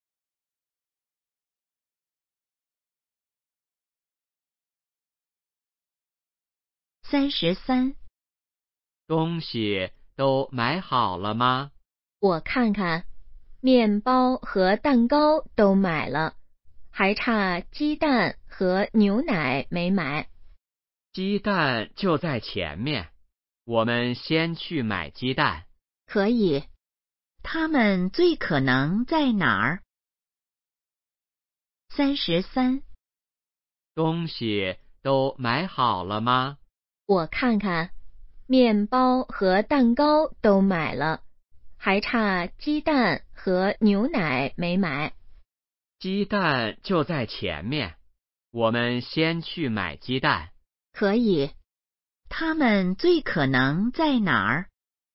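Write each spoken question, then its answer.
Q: 他们最可能在哪儿?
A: 超市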